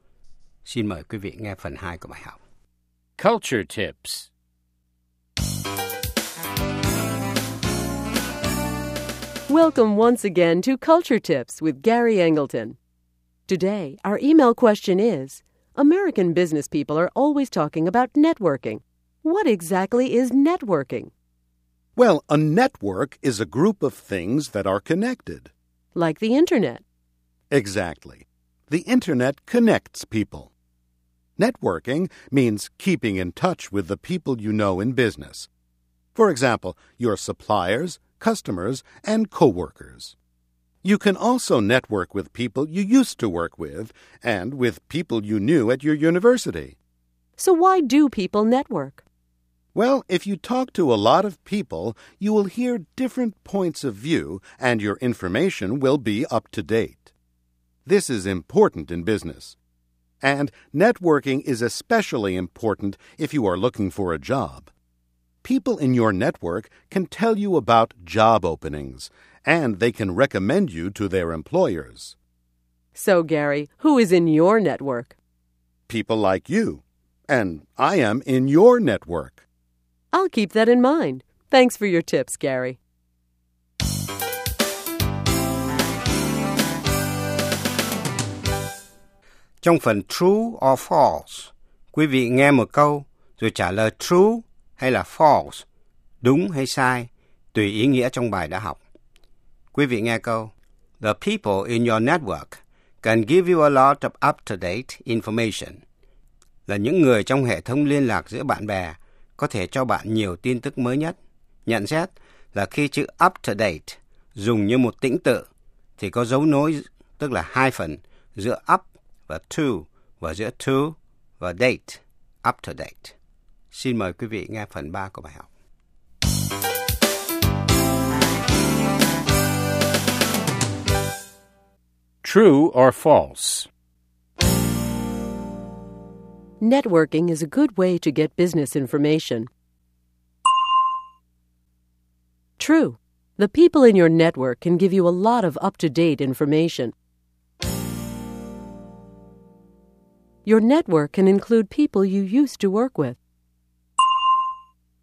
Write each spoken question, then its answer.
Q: Your network can include people you used to work with.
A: True. Former coworkers can be a good source of information and job recommendations.